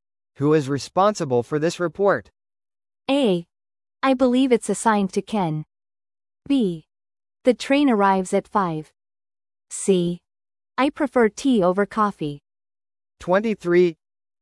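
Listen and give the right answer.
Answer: A: I believe it's assigned to Ken.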